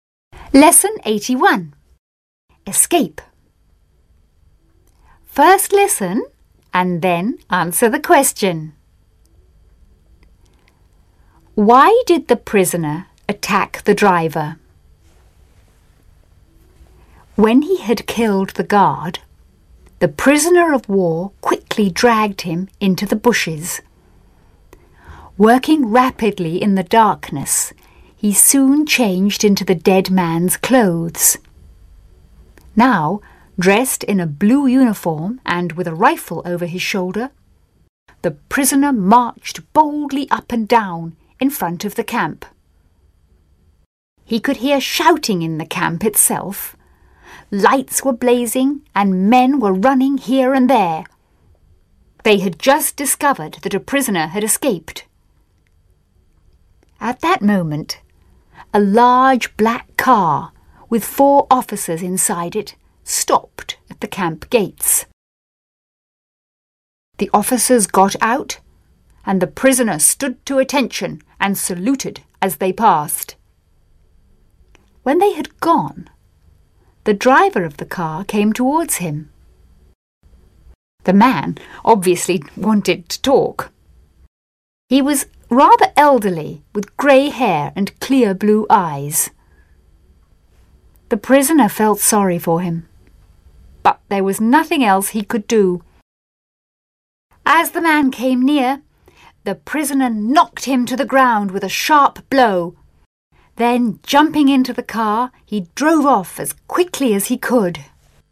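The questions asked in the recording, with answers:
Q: Why did the prisoner attack the driver?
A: So he could take the car and escape.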